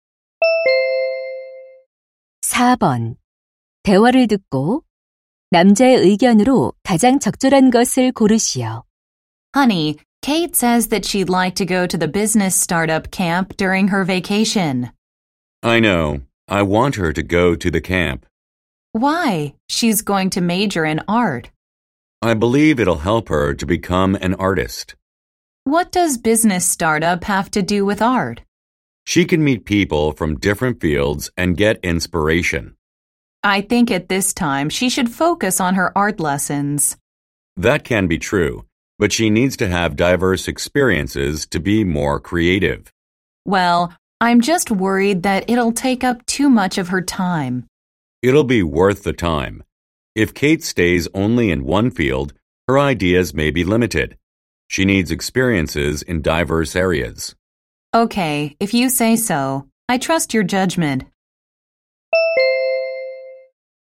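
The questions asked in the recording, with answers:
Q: 대화를 듣고 남자의 의견으로 가장 적절한 것을 고르시오.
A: 창의성을 위해 다양한 분야의 경험이 필요하다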